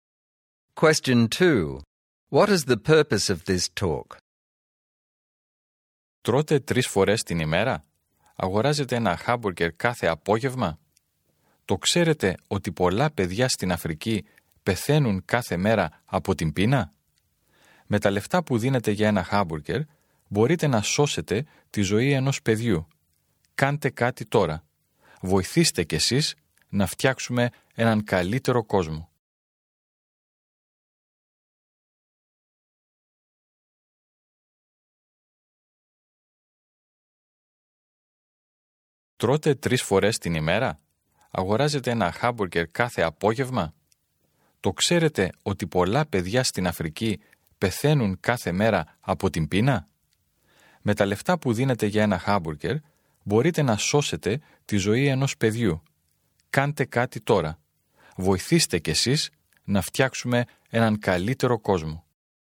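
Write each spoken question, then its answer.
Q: What is the purpose of this talk?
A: To ask people to donate money to save starving children in Africa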